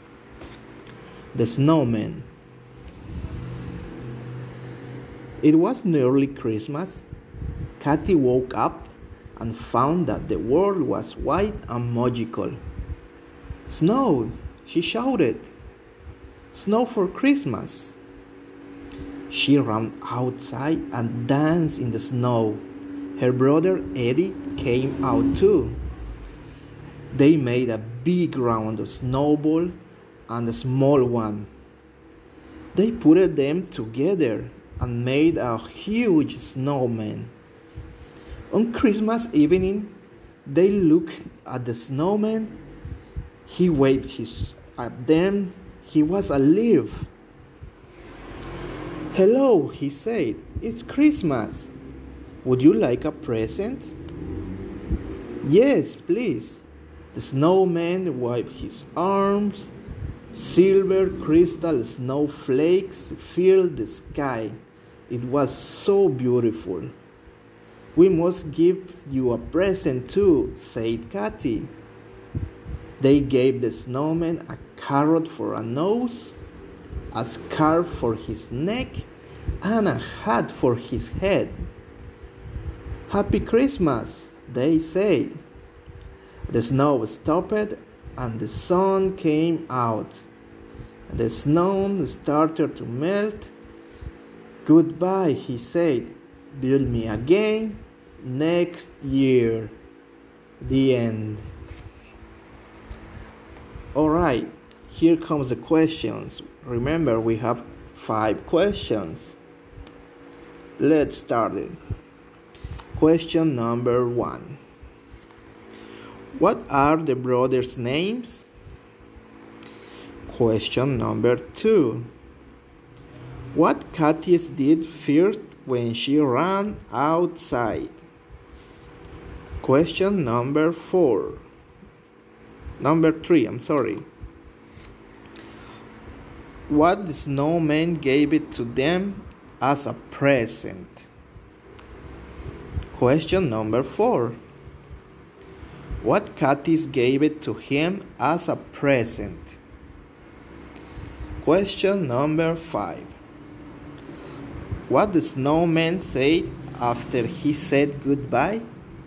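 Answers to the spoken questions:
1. Katy and Eddie
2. She danced in the snow
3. Silver crystal snowflakes filling the sky
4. A carrot for a nose, a scarf and a hat
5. Build me again next year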